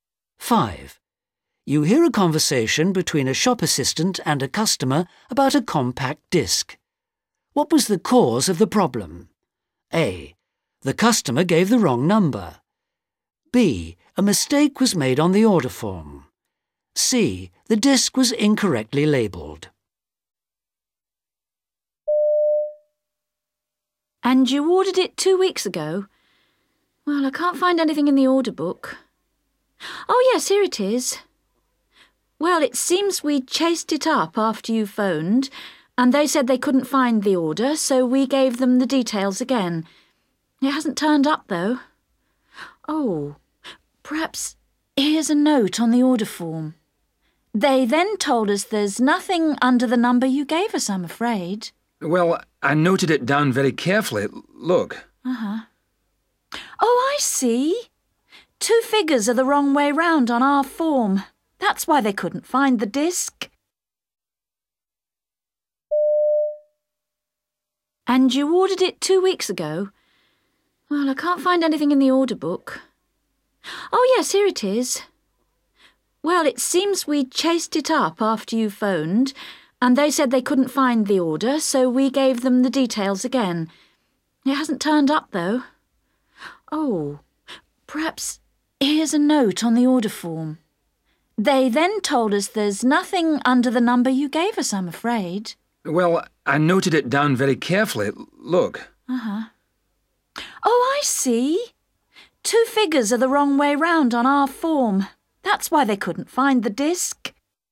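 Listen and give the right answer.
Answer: B: A mistake was made on the order form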